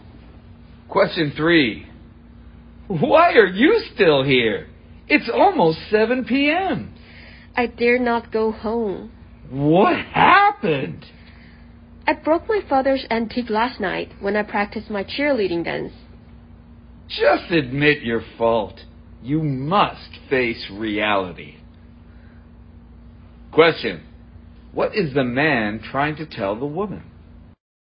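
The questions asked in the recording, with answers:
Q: What is the man trying to tell the woman?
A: She should admit her fault and face reality.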